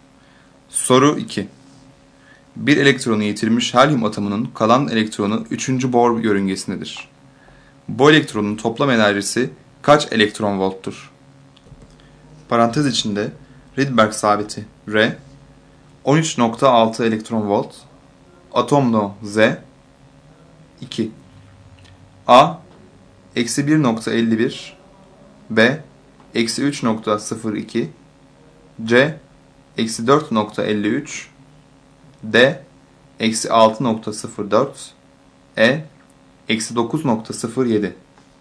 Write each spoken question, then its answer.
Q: Bu elektronun toplam enerjisi kaç elektron volttur?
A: Doğru yanıt D şıkkı.